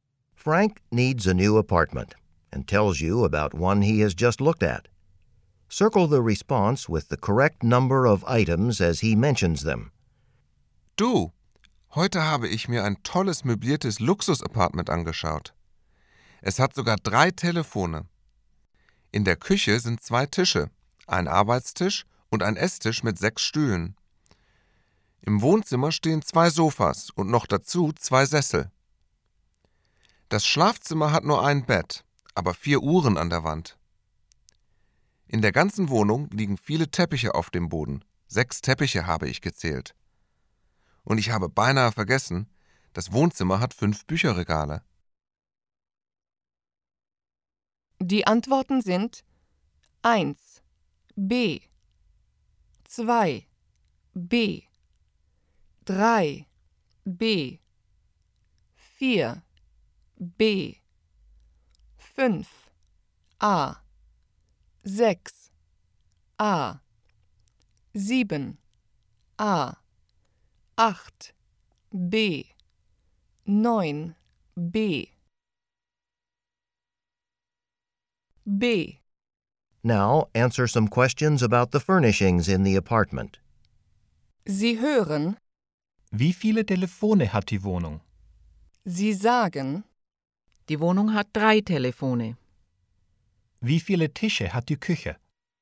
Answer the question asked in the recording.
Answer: Die Küche hat zwei Tische.